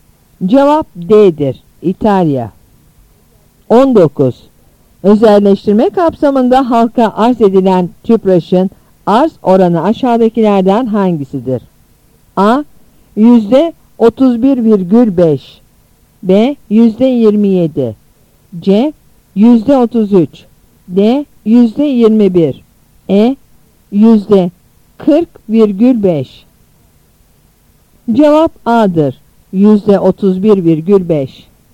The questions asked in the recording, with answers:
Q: Özelleştirme kapsamında halka arz edilen TÜPRAŞ'ın arz oranı aşağıdakilerden hangisidir?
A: Cevap A'dır. %31,5.